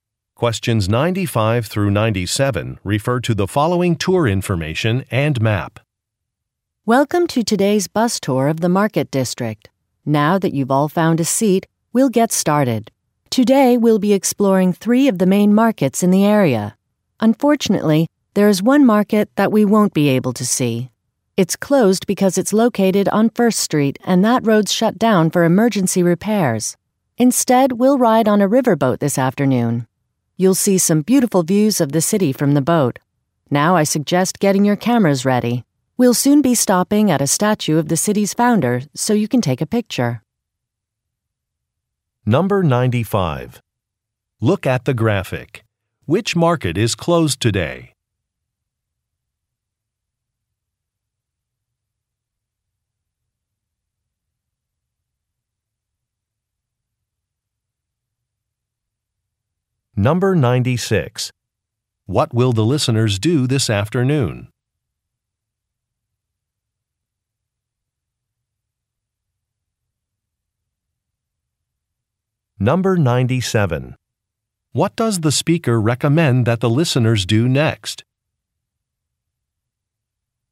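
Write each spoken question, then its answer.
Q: What will the listeners do this afternoon?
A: Ride on a riverboat

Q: What does the speaker recommend that the listeners do next?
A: Get their cameras ready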